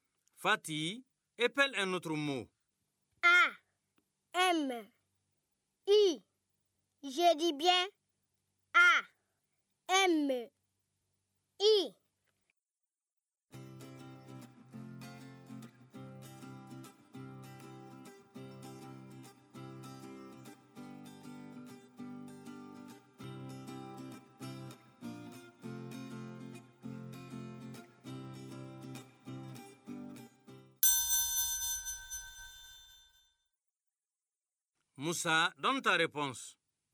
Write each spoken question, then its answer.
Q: Moussa, donne ta réponse.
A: Monsieur, A, M, I, c'est ami.